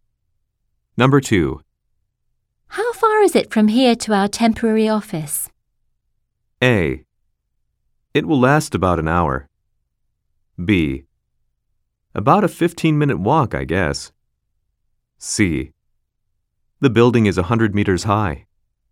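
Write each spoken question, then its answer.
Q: How far is it from here to our temporary office?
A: B: About a 15-minute walk, I guess.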